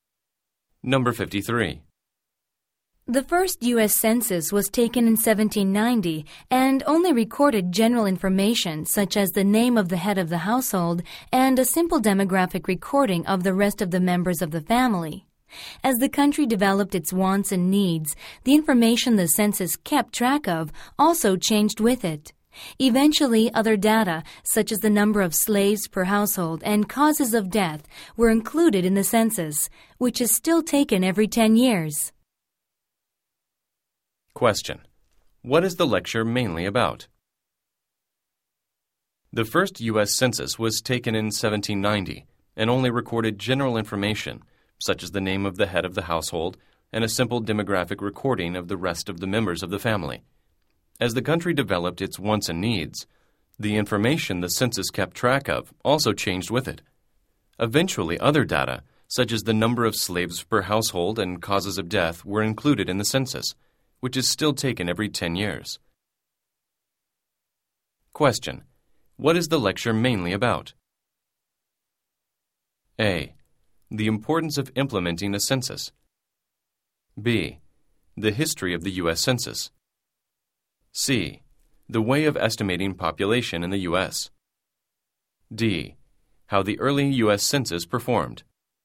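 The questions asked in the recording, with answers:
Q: What is the lecture mainly about?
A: B: The history of the U.S. Census.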